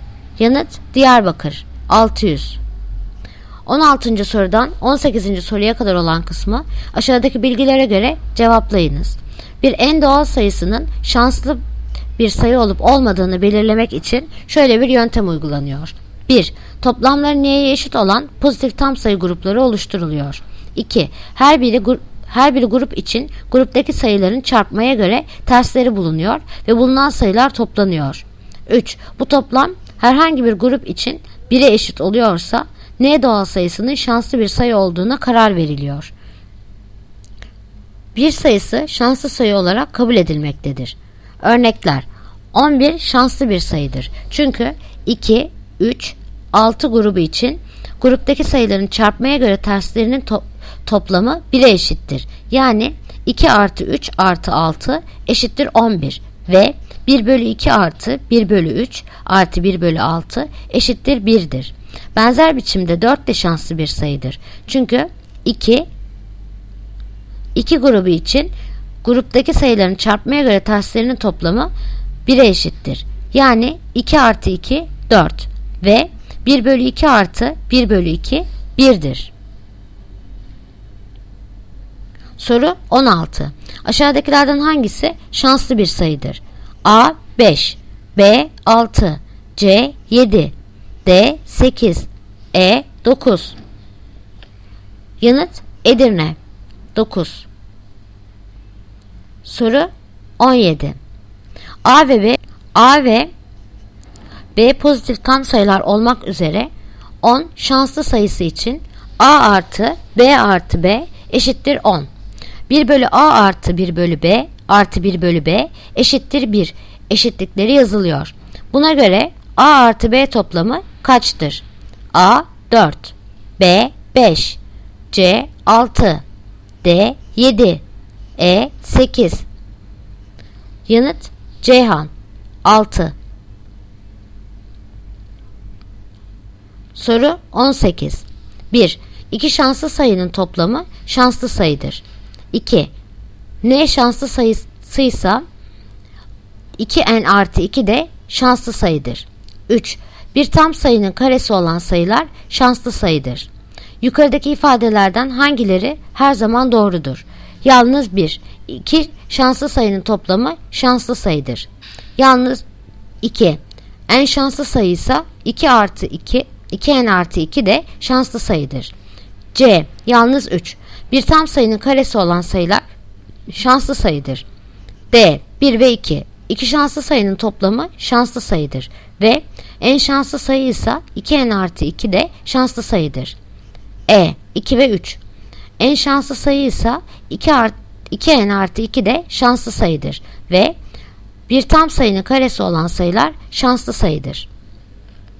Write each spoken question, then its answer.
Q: Aşağıdakilerden hangisi şanslı bir sayıdır?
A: Yanıt Edirne 9.

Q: Buna göre A artı B toplamı kaçtır?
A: Yanıt Ceyhan 6.